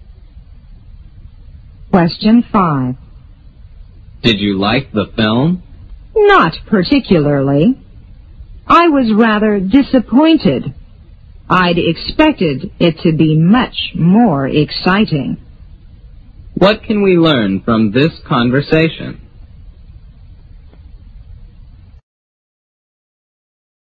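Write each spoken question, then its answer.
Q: What can we learn from this conversation?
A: The speaker was disappointed with the film; it was less exciting than expected.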